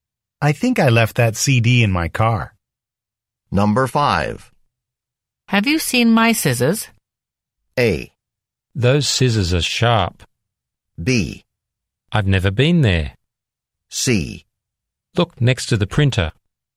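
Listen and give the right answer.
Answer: C: Look next to the printer.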